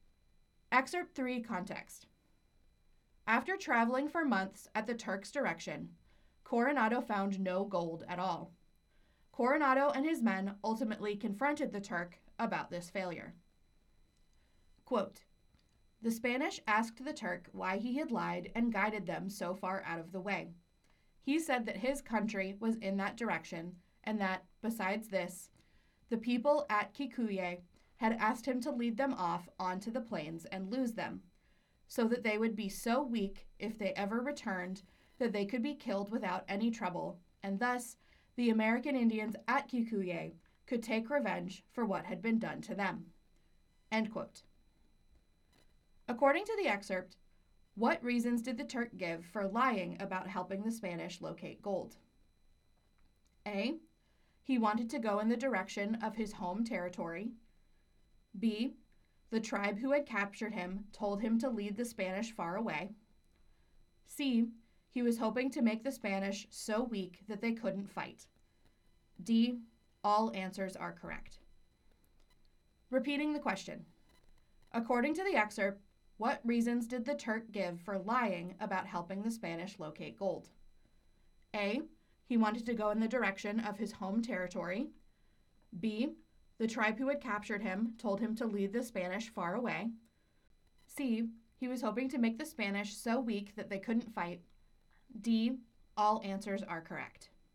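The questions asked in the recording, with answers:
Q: According to the excerpt, what reasons did the Turk give for lying about helping the Spanish locate gold?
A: D: All answers are correct.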